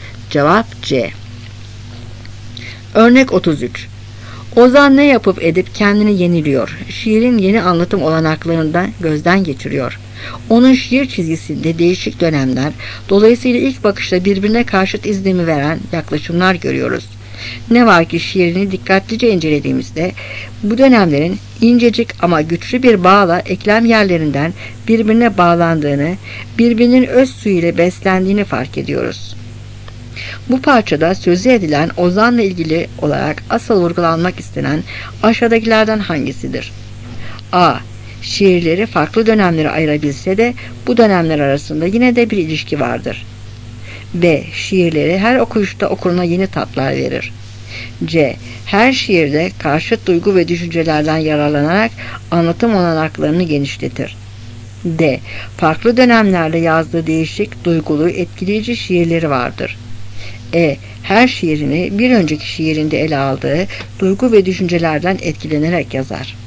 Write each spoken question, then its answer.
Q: Bu parçada sözü edilen Ozan'la ilgili olarak asıl vurgulanmak istenen aşağıdakilerden hangisidir?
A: Cevap A.